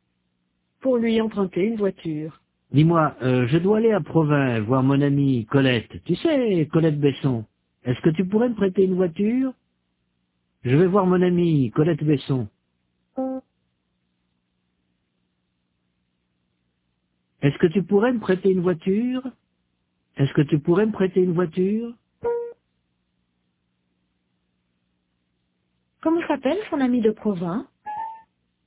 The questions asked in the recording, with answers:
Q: Comment s'appelle son amie de Provins?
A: Colette Besson.